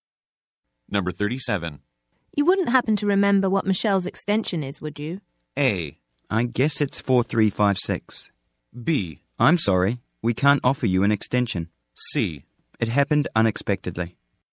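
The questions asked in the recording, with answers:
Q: You wouldn't happen to remember what Michelle's extension is, would you?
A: A: I guess it's 4356.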